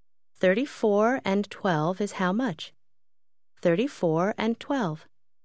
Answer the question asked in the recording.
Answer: 34 and 12 is 46.